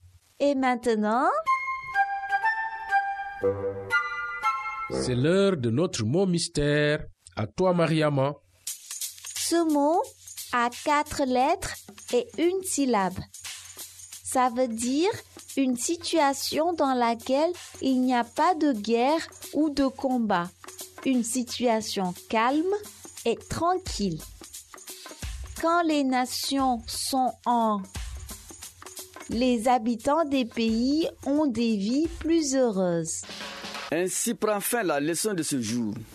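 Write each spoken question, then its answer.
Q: Ce mot a 4 lettres et 1 syllabe. Ça veut dire une situation dans laquelle il n'y a pas de guerre ou de combat.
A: paix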